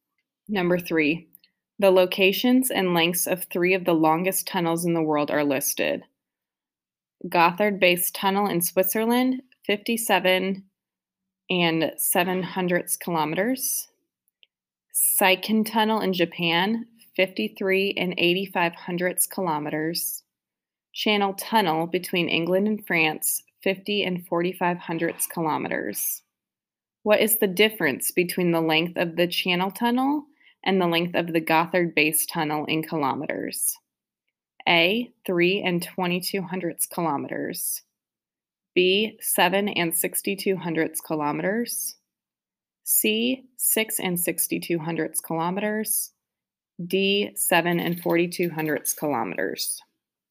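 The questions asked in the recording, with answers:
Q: What is the difference between the length of the channel tunnel and the length of the Gothard base tunnel in kilometers?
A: C: 6 and 62 hundredths kilometers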